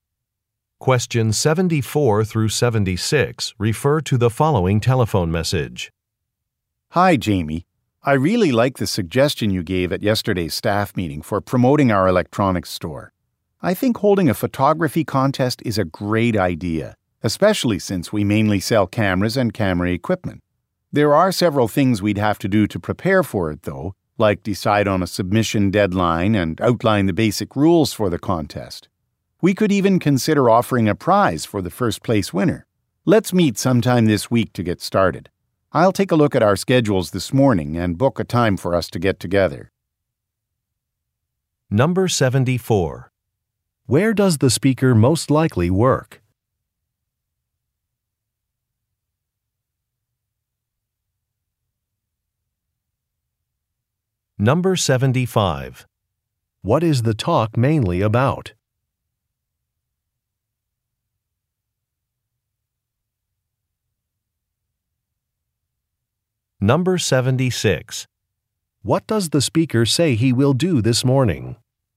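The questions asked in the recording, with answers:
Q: Where does the speaker most likely work?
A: At an electronics store

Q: What is the talk mainly about?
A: A photography contest

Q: What does the speaker say he will do this morning?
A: Check schedules and book a meeting time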